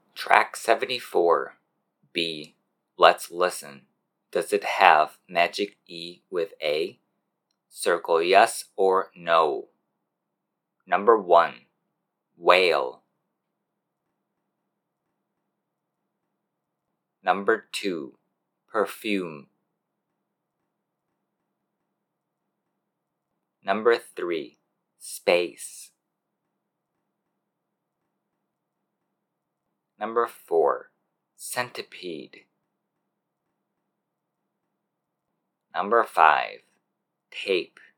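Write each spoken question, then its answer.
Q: Whale.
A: yes

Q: Perfume.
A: no

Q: Space.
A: yes

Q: Centipede.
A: no

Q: Tape.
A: yes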